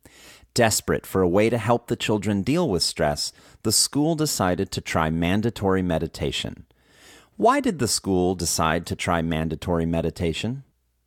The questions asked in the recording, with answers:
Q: Why did the school decide to try mandatory meditation?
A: The school decided to try mandatory meditation to help the children deal with stress.